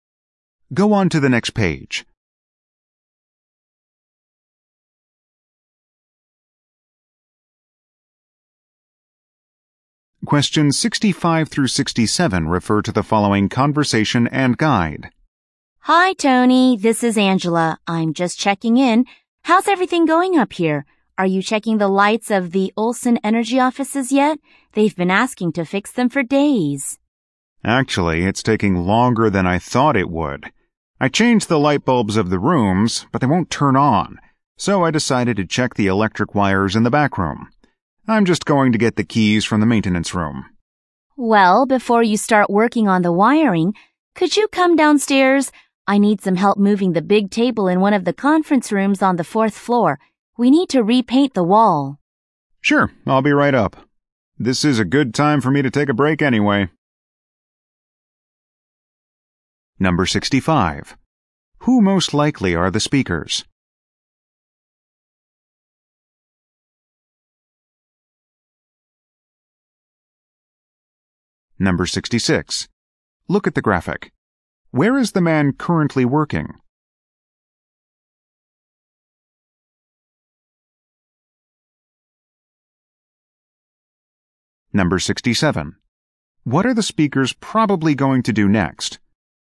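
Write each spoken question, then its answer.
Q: Who most likely are the speakers?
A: Building maintenance workers

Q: What are the speakers probably going to do next?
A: Move a table in a conference room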